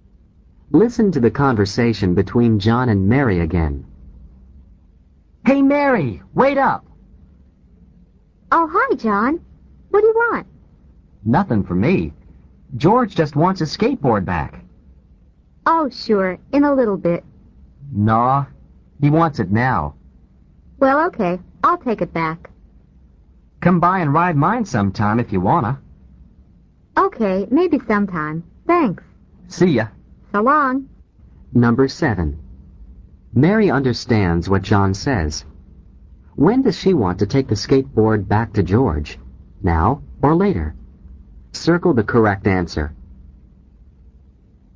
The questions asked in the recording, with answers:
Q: When does she want to take the skateboard back to George?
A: The correct answer is B, later.